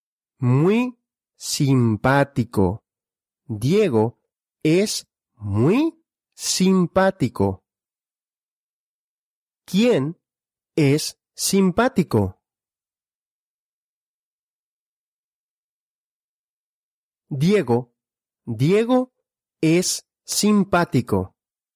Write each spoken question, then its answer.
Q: ¿Quién es simpático?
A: Diego, Diego es simpático.